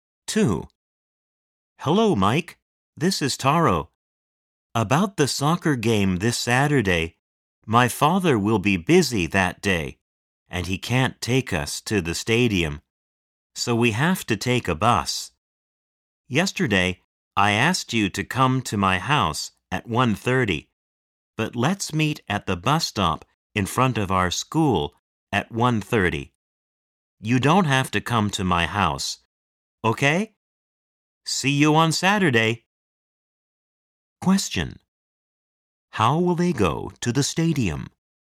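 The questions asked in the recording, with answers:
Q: How will they go to the stadium?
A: By bus.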